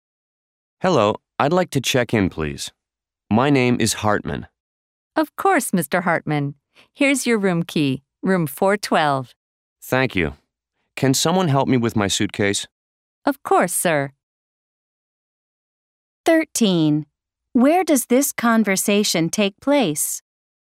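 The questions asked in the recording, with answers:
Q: Where does this conversation take place?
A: At a hotel (front desk)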